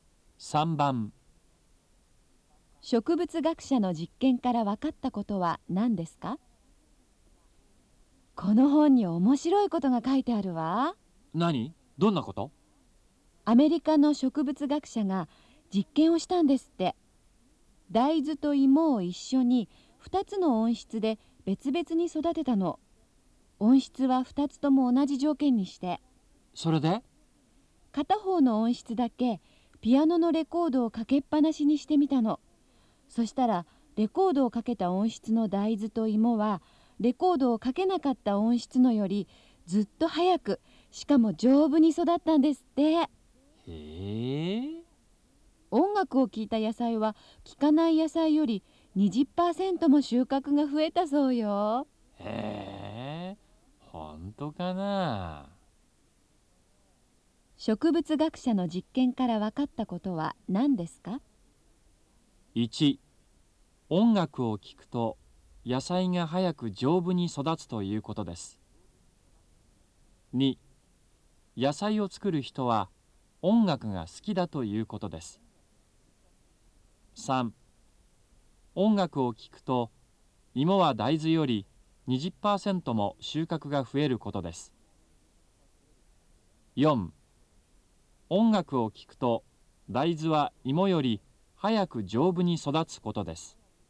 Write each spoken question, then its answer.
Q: 植物学者の実験から分かったことは何ですか?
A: 3番、1